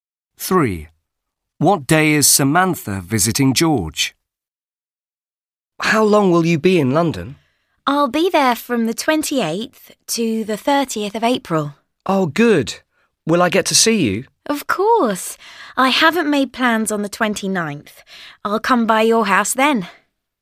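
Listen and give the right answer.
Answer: The 29th of April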